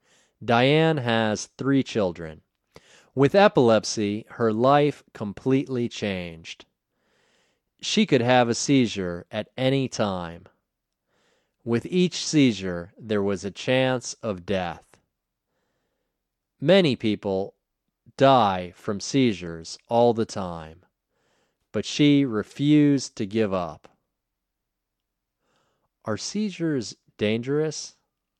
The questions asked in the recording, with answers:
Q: Are seizures dangerous?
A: Yes, seizures are dangerous.